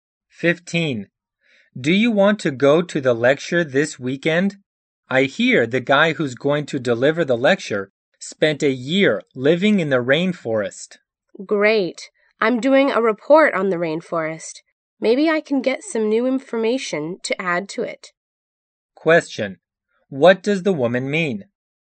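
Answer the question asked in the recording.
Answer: The lecture may give her new information for her rainforest report.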